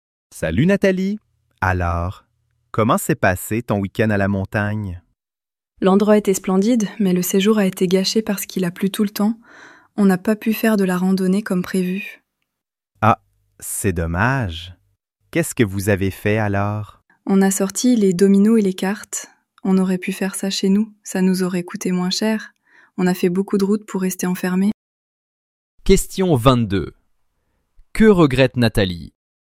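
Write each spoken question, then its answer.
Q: Que regrette Nathalie?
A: Il a plu tout le temps, donc ils n'ont pas pu faire de randonnée et sont restés enfermés.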